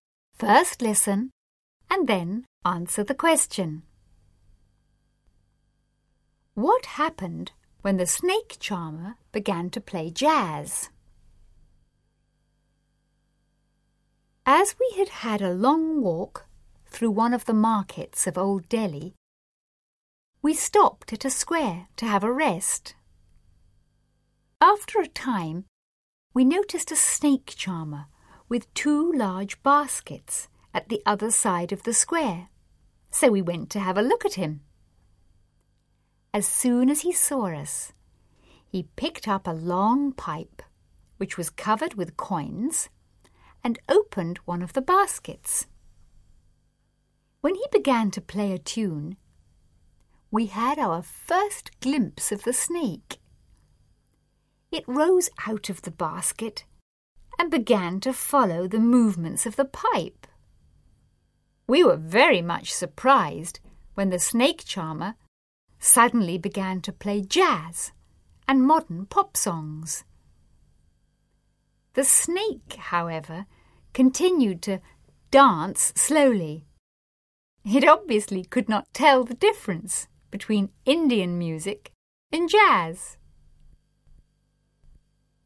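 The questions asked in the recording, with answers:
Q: What happened when the snake charmer began to play jazz?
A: The snake continued to dance slowly; it could not tell the difference between Indian music and jazz.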